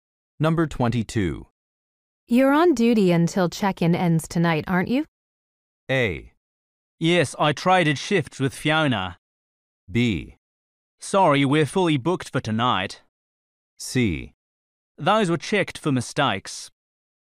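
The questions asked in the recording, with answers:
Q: You're on duty until check-in ends tonight, aren't you?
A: A: Yes, I traded shifts with Fiona.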